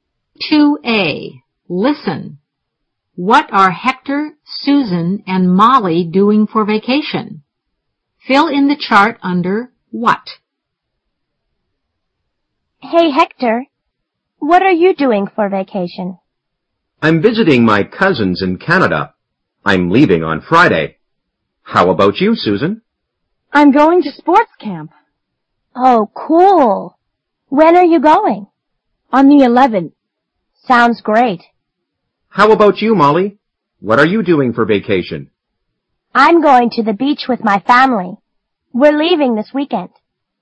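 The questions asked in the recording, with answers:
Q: What are Hector, Susan, and Molly doing for vacation?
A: Hector is visiting his cousins in Canada, Susan is going to sports camp, Molly is going to the beach with her family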